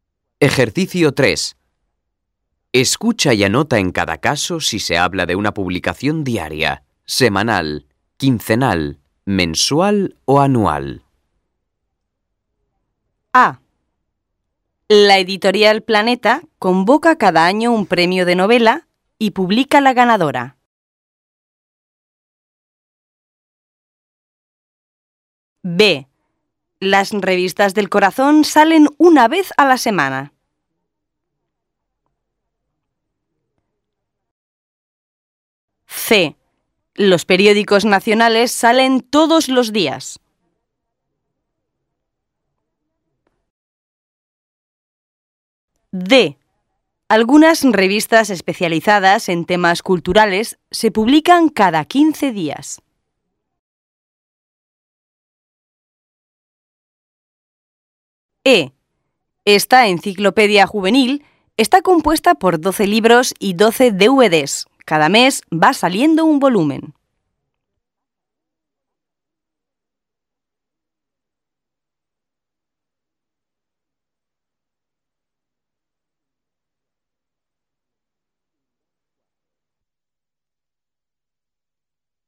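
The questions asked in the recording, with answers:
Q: La editorial Planeta convoca cada año un premio de novela y publica la ganadora.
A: anual

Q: Las revistas del corazón salen una vez a la semana.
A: semanal

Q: Los periódicos nacionales salen todos los días.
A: diaria

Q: Algunas revistas especializadas en temas culturales se publican cada 15 días.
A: quincenal

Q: Esta enciclopedia juvenil está compuesta por 12 libros y 12 DVDs.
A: mensual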